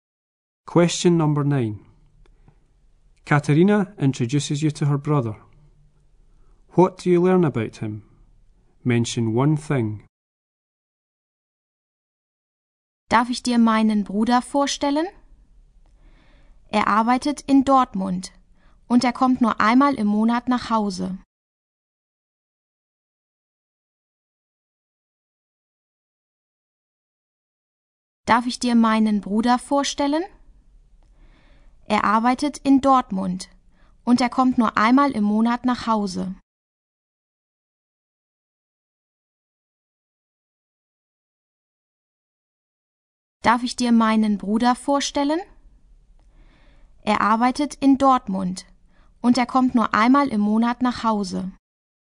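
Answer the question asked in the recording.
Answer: He works in Dortmund / comes home only once a month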